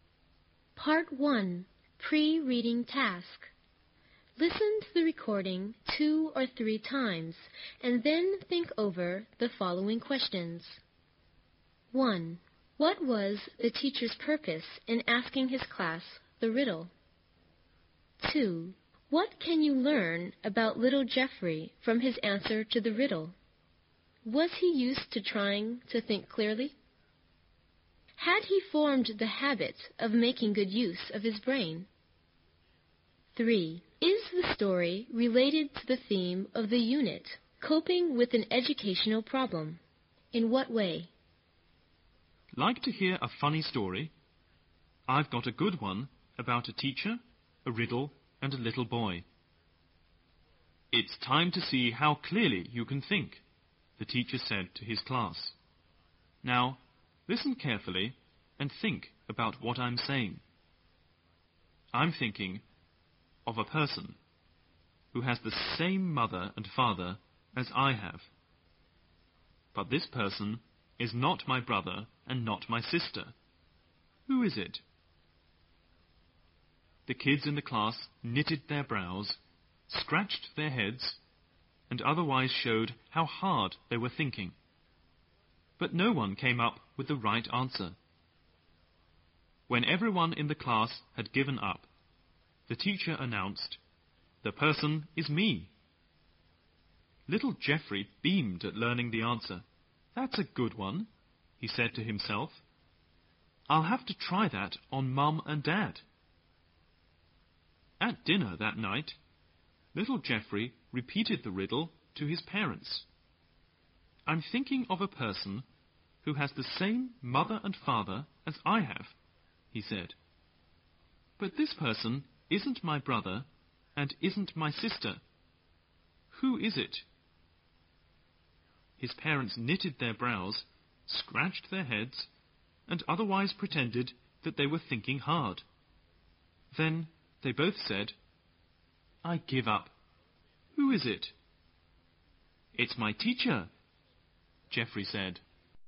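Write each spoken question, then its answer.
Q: What was the teacher's purpose in asking his class the riddle?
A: To see how clearly the students could think

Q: Was he used to trying to think clearly?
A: No, he just repeated the riddle without understanding it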